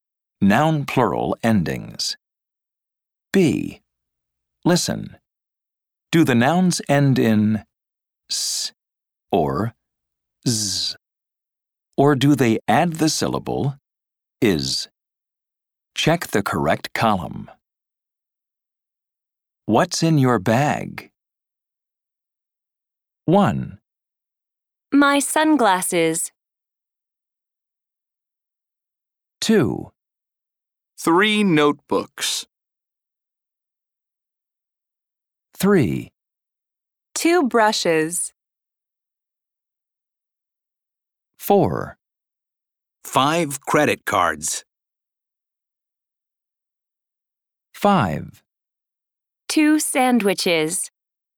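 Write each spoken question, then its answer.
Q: My sunglasses.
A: adds the syllable is (/ɪz/)

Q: 2 brushes.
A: adds the syllable is (/ɪz/)

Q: 2 sandwiches.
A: adds the syllable is (/ɪz/)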